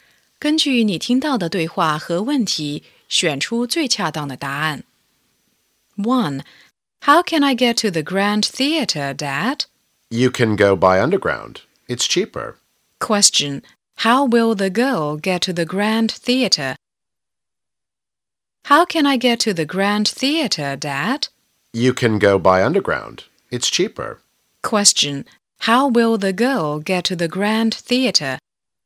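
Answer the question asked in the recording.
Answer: By underground.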